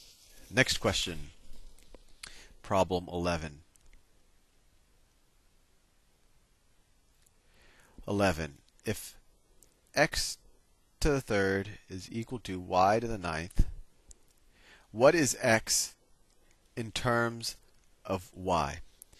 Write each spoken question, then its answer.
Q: If x to the third is equal to y to the ninth, what is x in terms of y?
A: So x is equal to y to the third power.